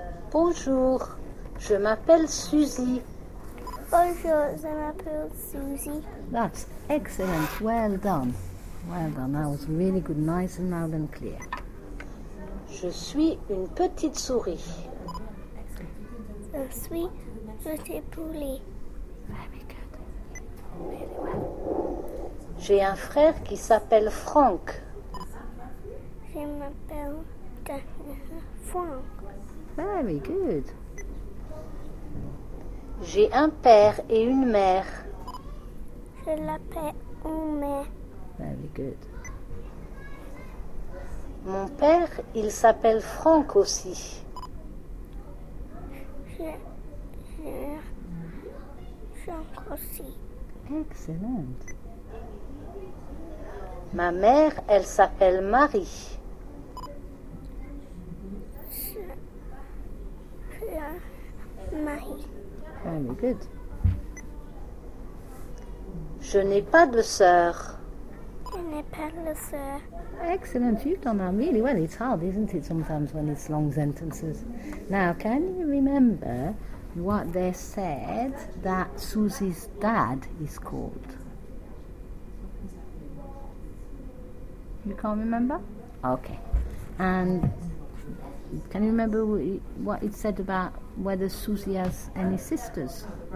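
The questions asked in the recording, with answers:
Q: Now, can you remember what they said that Susie's dad is called?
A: Franck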